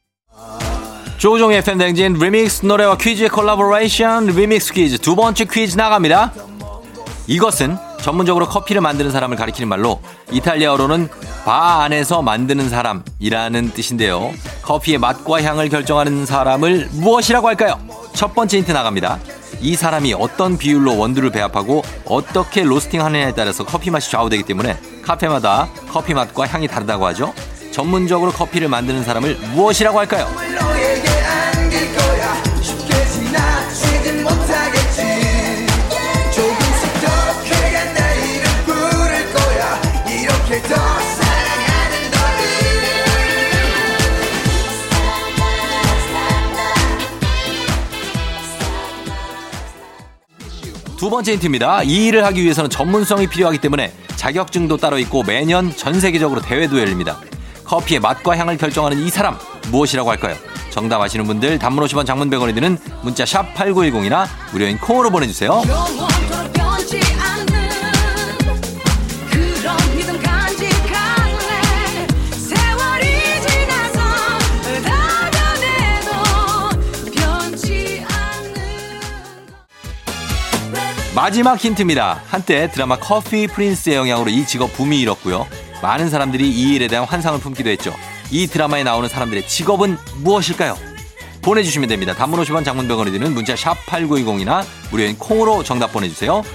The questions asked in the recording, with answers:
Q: 커피의 맛과 향을 결정하는 사람을 무엇이라고 할까요?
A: 바리스타입니다.